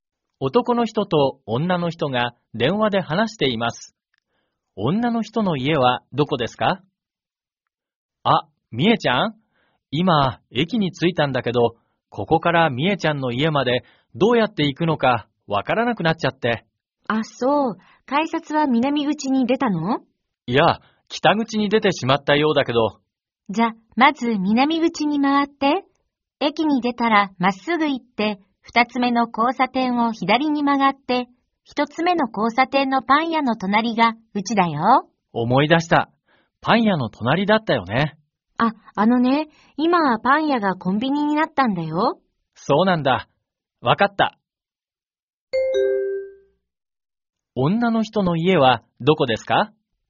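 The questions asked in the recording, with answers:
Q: 女の人の家はどこですか?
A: 南口からまっすぐ行き、二つ目の交差点を左に曲がった一つ目の交差点のコンビニの隣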